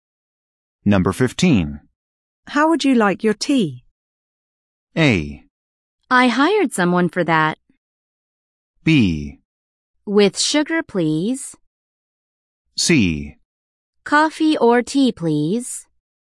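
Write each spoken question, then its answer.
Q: How would you like your tea?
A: B: With sugar, please.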